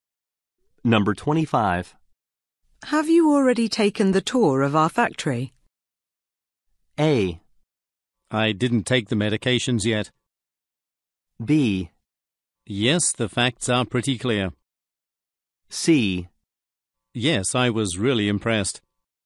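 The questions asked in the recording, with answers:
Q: Have you already taken the tour of our factory?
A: C: Yes, I was really impressed.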